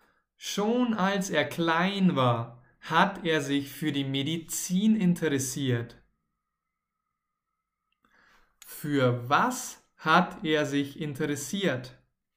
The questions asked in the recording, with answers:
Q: Für was hat er sich interessiert?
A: Für die Medizin. Er hat sich für die Medizin interessiert.